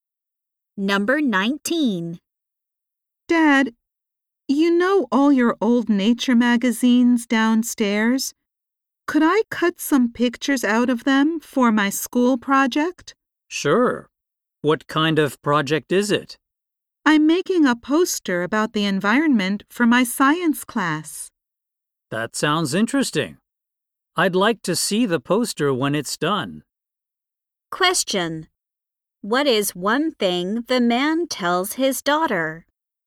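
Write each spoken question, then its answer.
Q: What is one thing the man tells his daughter?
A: He'd like to see the poster when it's done.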